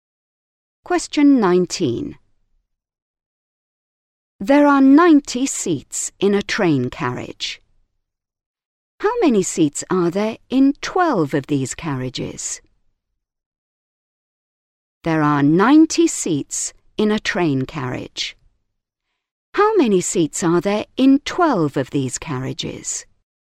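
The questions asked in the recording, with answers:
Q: How many seats are there in 12 of these carriages?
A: 1080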